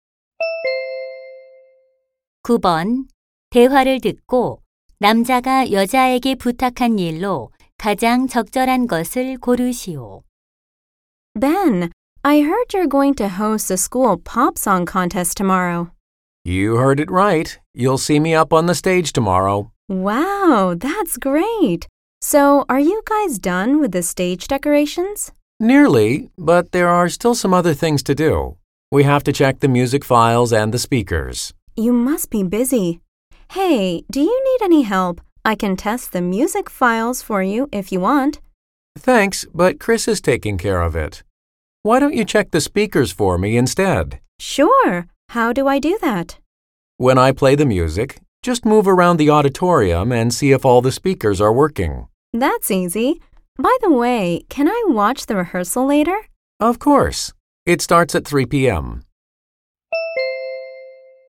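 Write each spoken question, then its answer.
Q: 대화를 듣고 남자가 여자에게 부탁한 일로 가장 적절한 것을 고르시오.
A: 강당의 스피커가 작동하는지 확인하기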